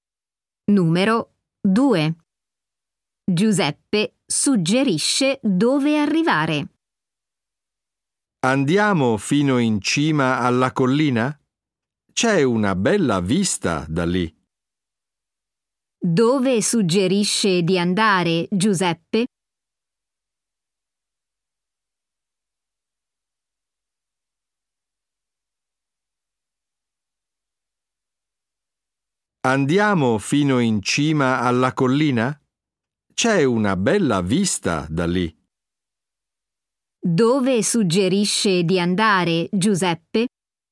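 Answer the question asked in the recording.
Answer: In cima alla collina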